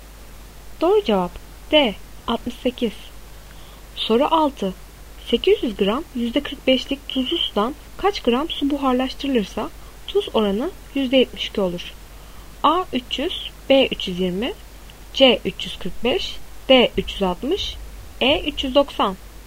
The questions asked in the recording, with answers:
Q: 800 gram %45'lik tuzlu sudan kaç gram su buharlaştırılırsa tuz oranı %72 olur?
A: Doğru cevap A 300.